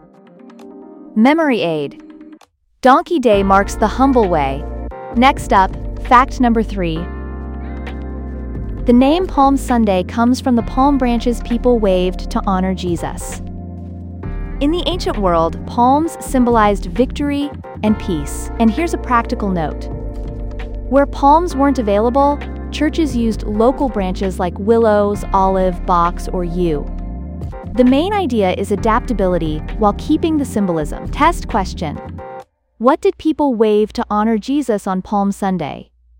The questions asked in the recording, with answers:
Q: What did people wave to honor Jesus on Palm Sunday?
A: Palm branches.